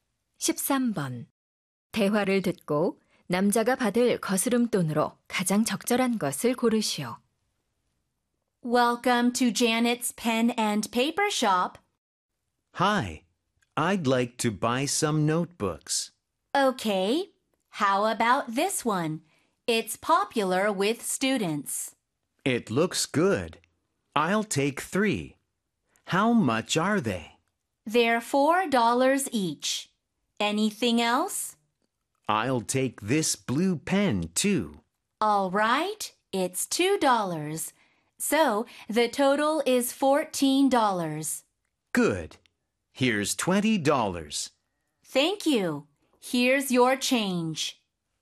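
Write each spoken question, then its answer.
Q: 대화를 듣고 남자가 받을 거스름돈으로 가장 적절한 것을 고르시오.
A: 6달러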